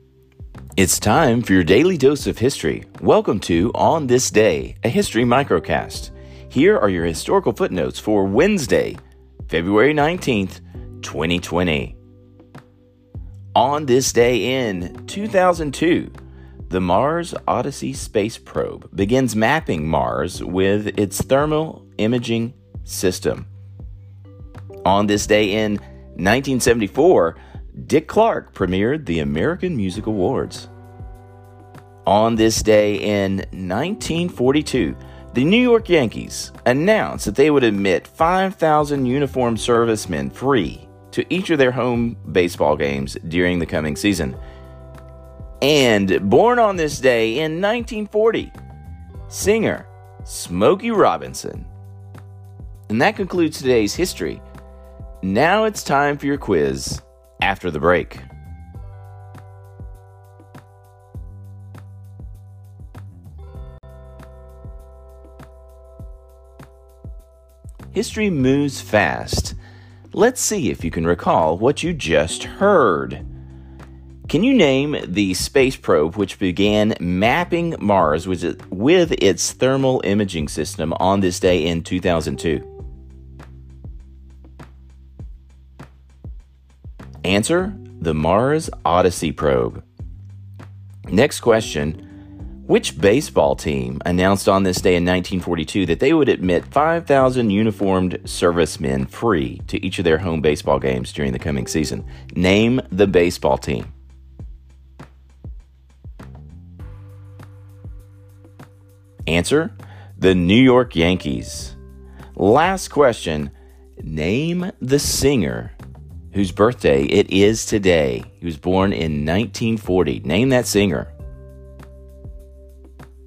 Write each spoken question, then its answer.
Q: Can you name the space probe which began mapping Mars with its thermal imaging system on this day in 2002?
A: the Mars Odyssey probe.

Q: Which baseball team announced on this day in 1942 that they would admit 5,000 uniformed servicemen free to each of their home baseball games during the coming season?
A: the New York Yankees.